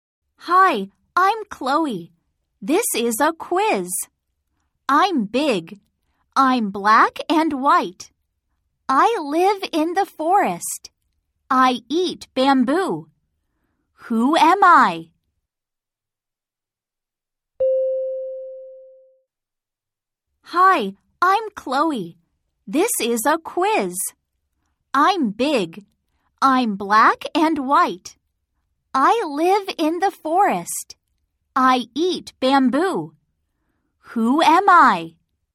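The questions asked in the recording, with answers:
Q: Who am I?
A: a panda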